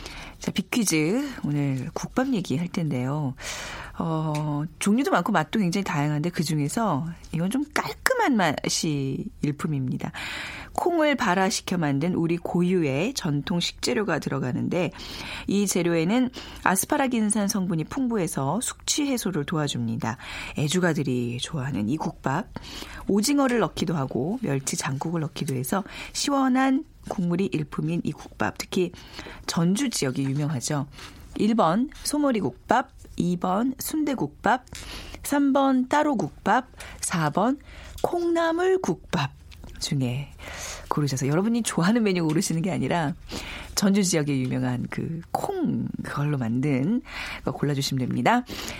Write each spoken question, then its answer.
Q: 애주가들이 좋아하는 이 국밥 오징어를 넣기도 하고 멸치 장국을 넣기도 해서 시원한 국물이 일품인 이 국밥 특히 전주 지역이 유명하죠.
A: 오늘 정답은요. 4번 콩나물 국밥입니다.